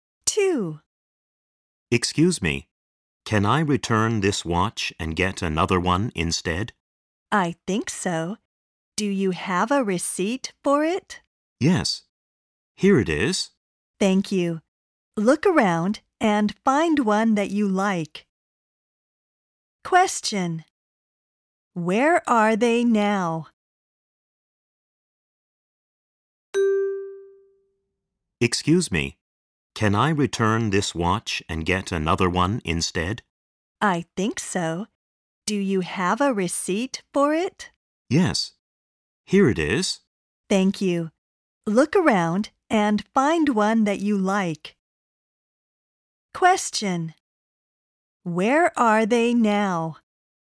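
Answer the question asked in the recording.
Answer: In a shop (a watch store)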